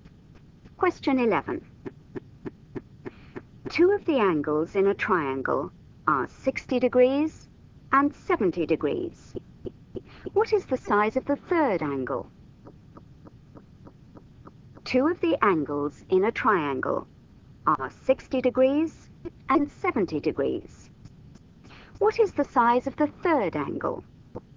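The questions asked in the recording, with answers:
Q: What is the size of the third angle?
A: 50 degrees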